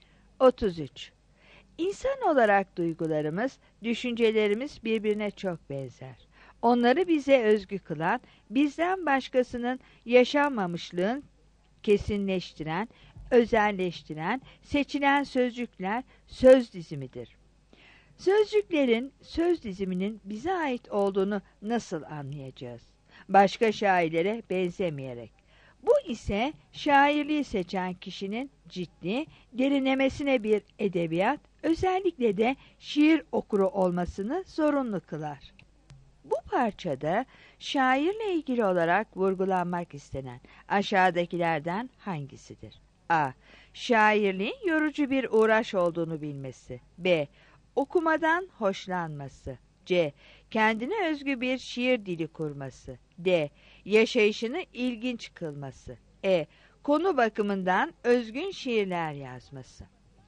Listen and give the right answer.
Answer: 33 C